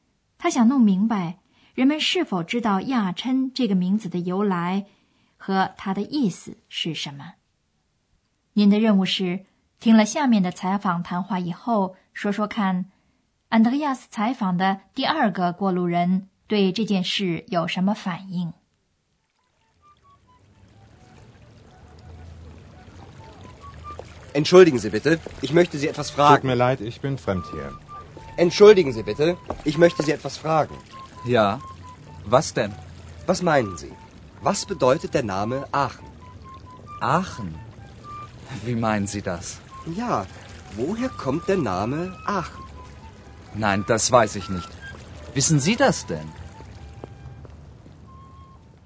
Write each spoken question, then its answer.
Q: 您的任务是听了下面的采访谈话以后,说说看,安德烈亚斯采访的第二个过路人对这件事有什么反应?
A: Andreas 采访的第二个过路人不知道亚琛这个名字从何而来。